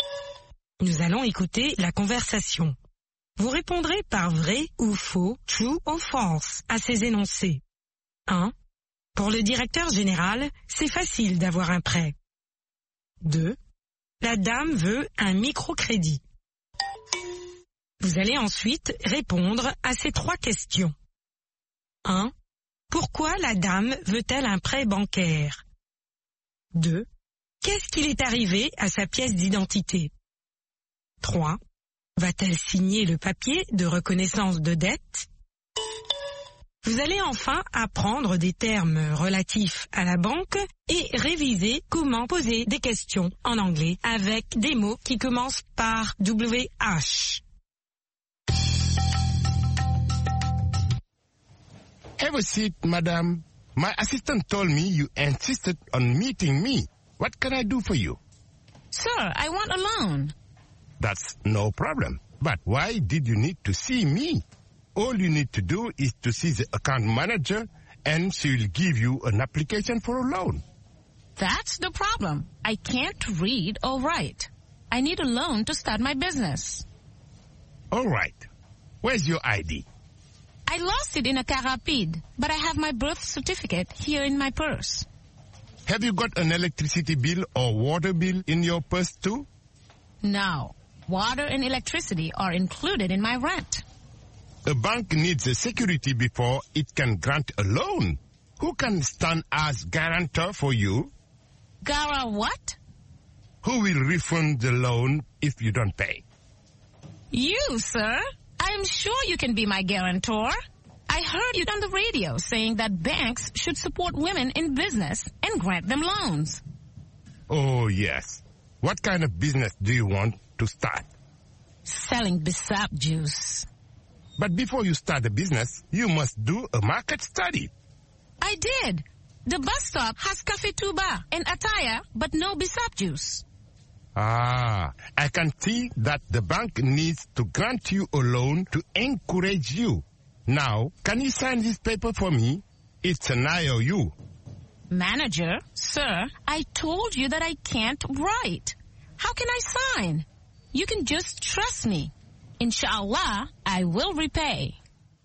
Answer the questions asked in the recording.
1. L'énoncé 1 est vrai.
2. L'énoncé 2 est faux.
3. Pour commencer son propre commerce.
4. Elle l'a perdue.
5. Non.